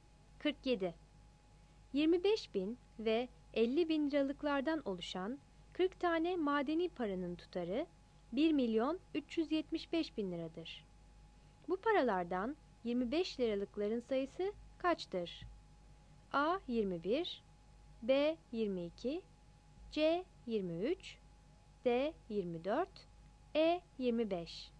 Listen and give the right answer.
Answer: 47 E